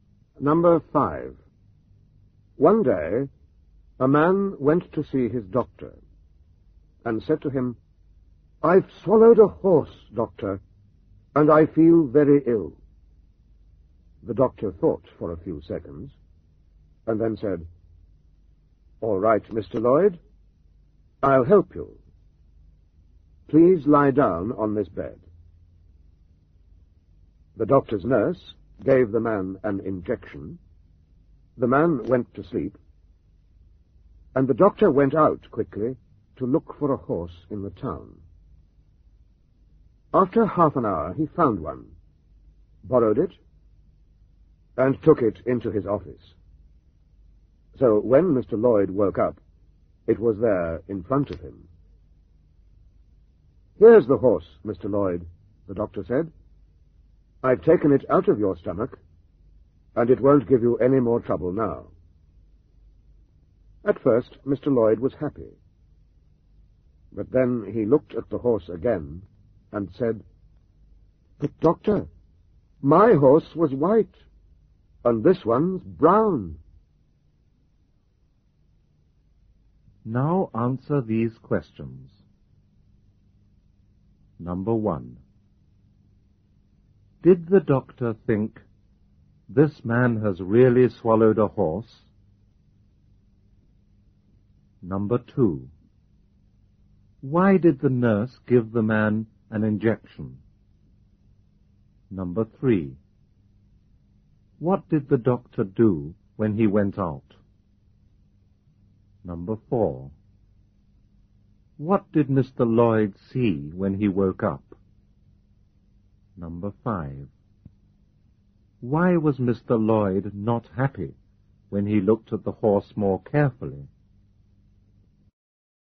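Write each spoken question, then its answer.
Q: Did the doctor think, "This man has really swallowed a horse"?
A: No

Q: What did the doctor do when he went out?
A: He looked for a horse in the town, borrowed one and took it into his office

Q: What did Mr. Lloyd see when he woke up?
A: A horse in front of him

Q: Why was Mr. Lloyd not happy when he looked at the horse more carefully?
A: Because his horse was white and this one was brown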